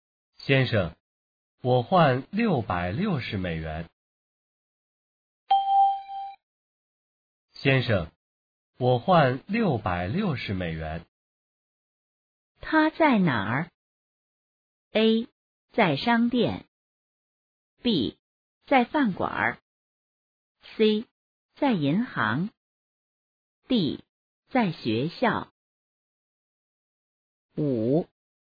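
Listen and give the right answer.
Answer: C: 在银行。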